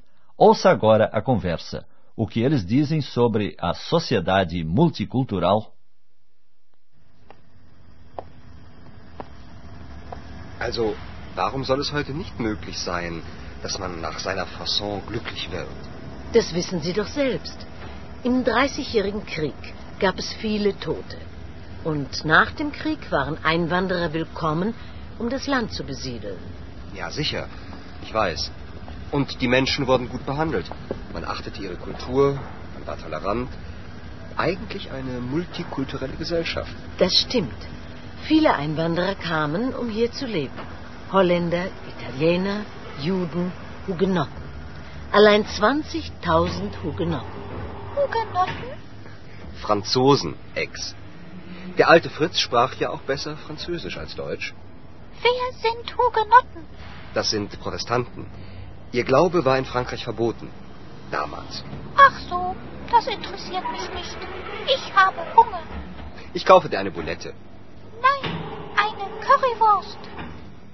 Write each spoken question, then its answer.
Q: O que eles dizem sobre a sociedade multicultural?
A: Andreas recorda saudoso os tempos em que uma sociedade multicultural era menos problemática do que hoje, e as pessoas eram bem tratadas.